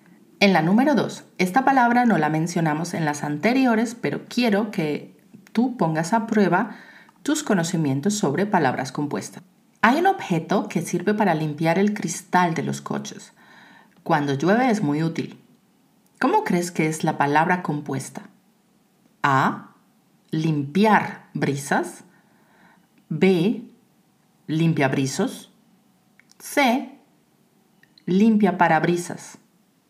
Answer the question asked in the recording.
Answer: La respuesta correcta es C, limpia parabrisas.